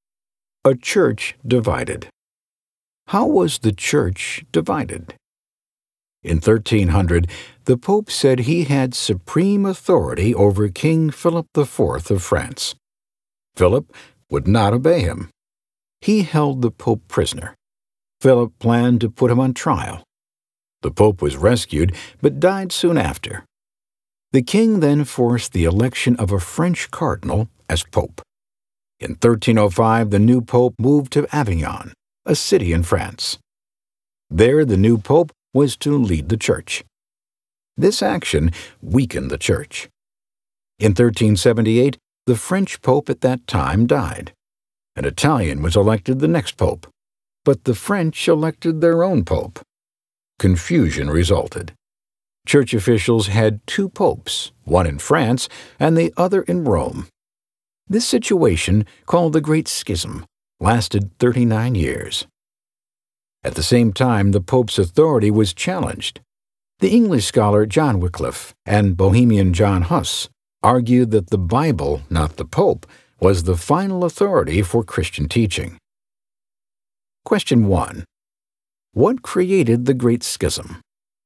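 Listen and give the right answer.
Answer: In 1378 an Italian was elected Pope but the French elected their own Pope, so the church had two popes, one in France and one in Rome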